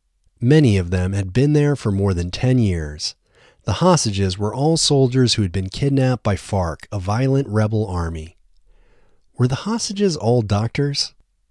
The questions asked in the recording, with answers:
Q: Were the hostages all doctors?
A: No, the hostages weren't all doctors.